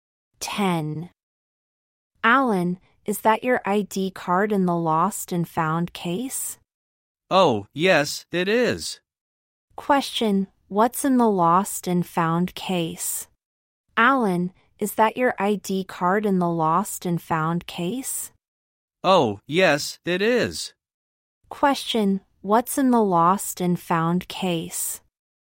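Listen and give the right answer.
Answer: Alan's ID card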